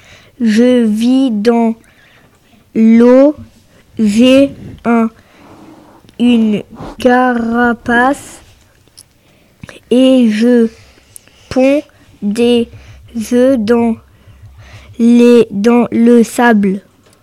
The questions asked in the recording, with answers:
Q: Je vis dans l'eau. J'ai une carapace et je pond des œufs dans le sable.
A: Je suis la tortue.